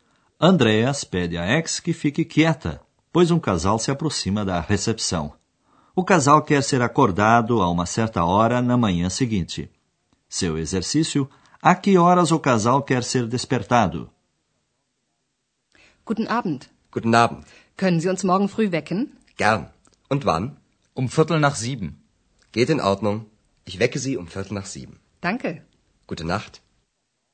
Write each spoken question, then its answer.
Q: Seu exercício: a que horas o casal quer ser despertado?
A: eles querem ser despertados às sete e quinze.